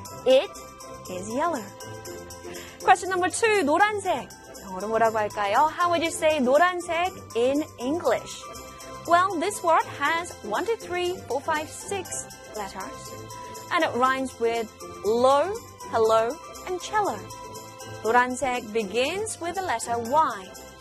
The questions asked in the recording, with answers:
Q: How would you say 노란색 in English?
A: Y-E-L-L-O-W, yellow. Yellow.